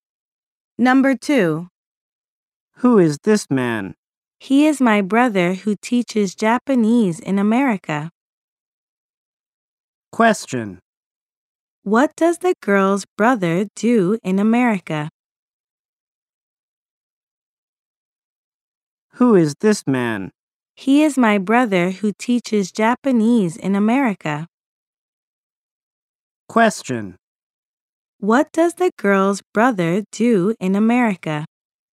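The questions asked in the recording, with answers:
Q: What does the girl's brother do in America?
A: He teaches Japanese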